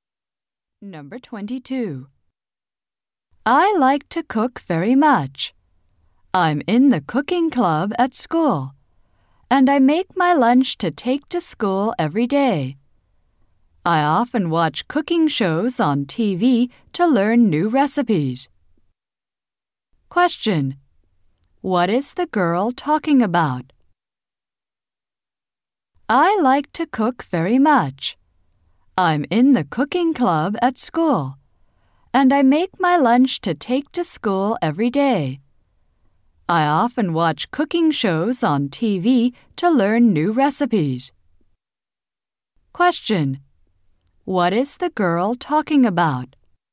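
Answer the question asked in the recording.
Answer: Her love of cooking.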